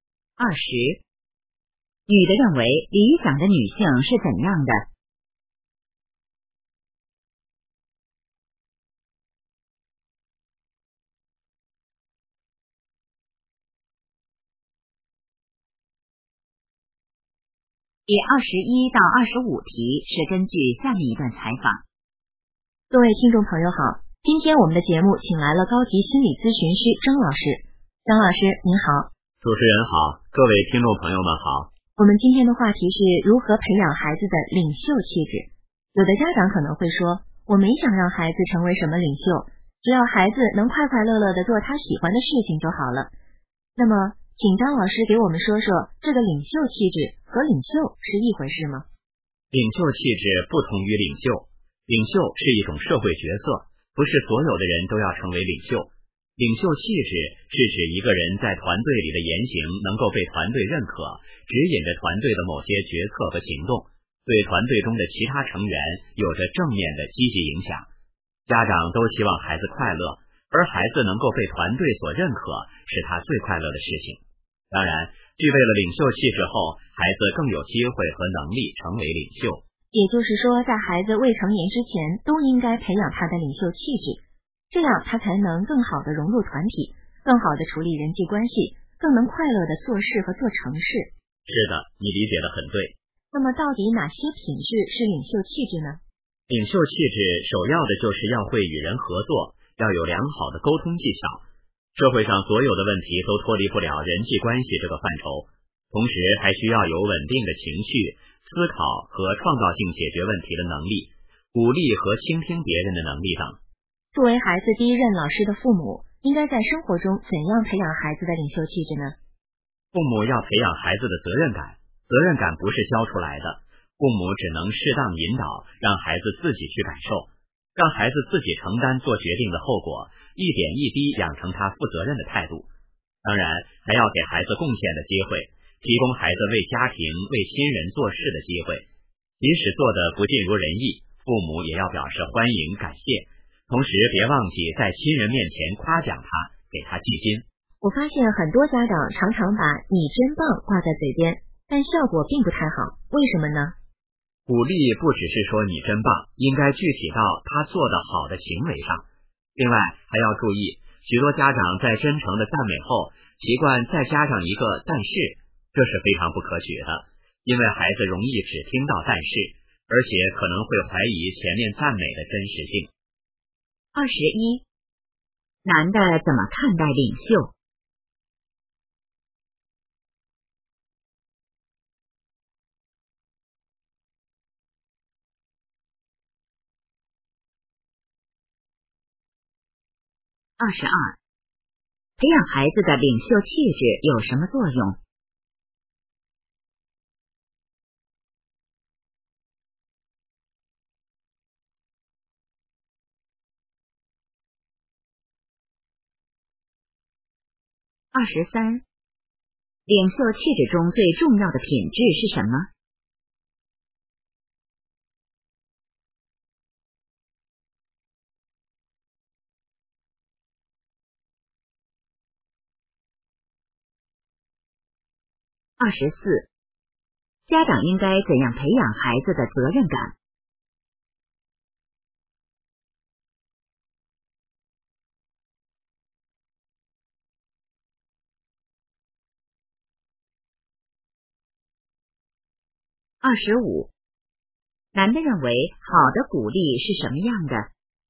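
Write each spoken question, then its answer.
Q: 男的怎么看待领袖?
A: 领袖是一种社会角色,不是所有人都要成为领袖

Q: 培养孩子的领袖气质有什么作用?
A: 能更好地融入团体、处理人际关系

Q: 领袖气质中最重要的品质是什么?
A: 会与人合作,有良好的沟通技巧

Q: 家长应该怎样培养孩子的责任感?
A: 适当引导,让孩子自己承担做决定的后果

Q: 男的认为好的鼓励是什么样的?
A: 具体到孩子做得好的行为上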